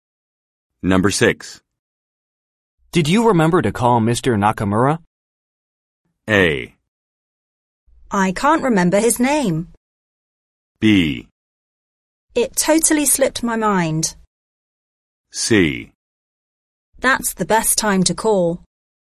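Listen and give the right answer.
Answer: B: It totally slipped my mind.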